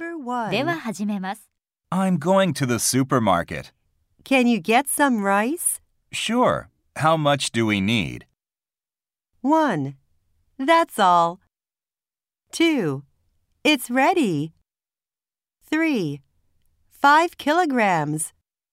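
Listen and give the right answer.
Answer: 3: 5 kilograms.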